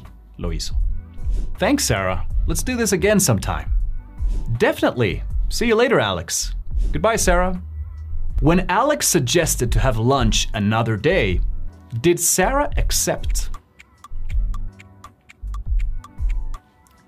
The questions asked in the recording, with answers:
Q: When Alex suggested to have lunch another day, did Sarah accept?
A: Yes, she did.